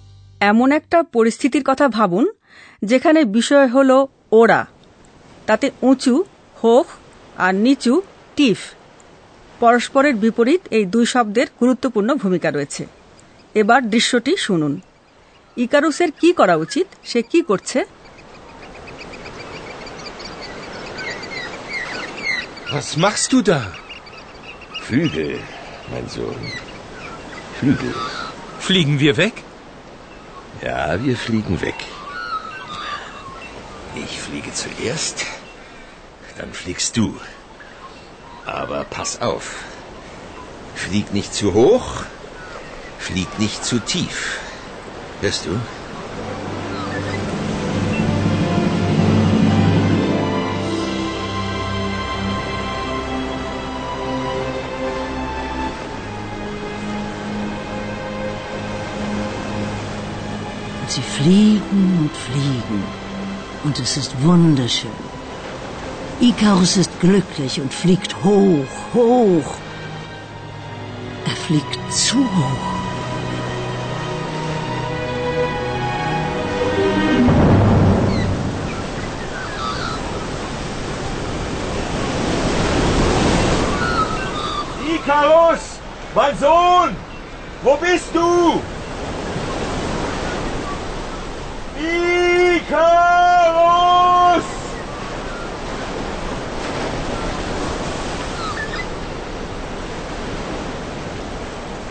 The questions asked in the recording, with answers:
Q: ইকারুসের কি করা উচিত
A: ইকারুসকে সাবধান হতে হবে